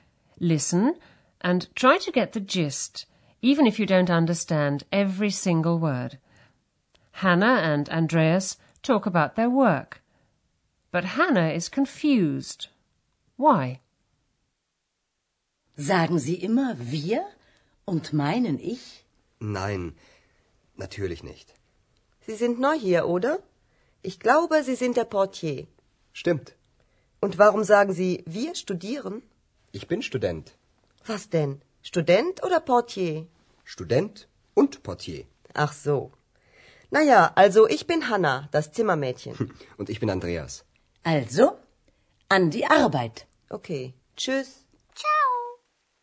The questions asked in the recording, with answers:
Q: Hannah and Andreas talk about their work, but Hannah is confused. Why?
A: Hannah is confused because Andreas says he's a student, although he's just told her that he's the hotel porter.